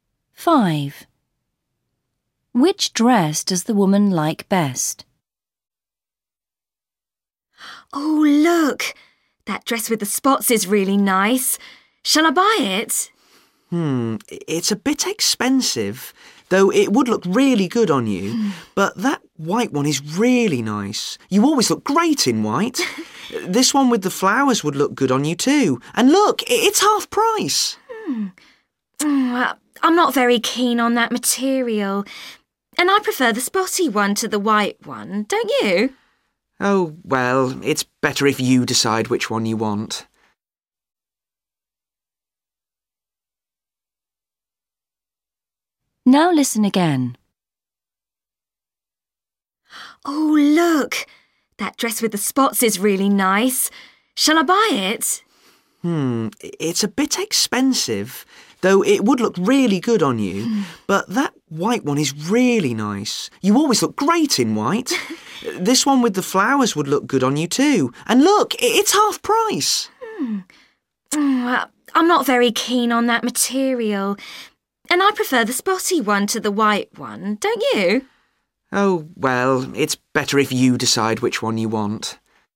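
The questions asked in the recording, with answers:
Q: Which dress does the woman like best?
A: The dress with spots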